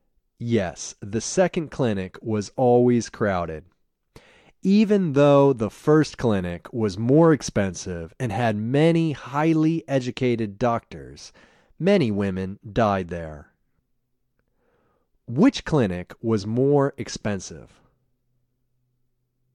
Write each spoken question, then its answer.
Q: Which clinic was more expensive?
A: The first clinic was more expensive.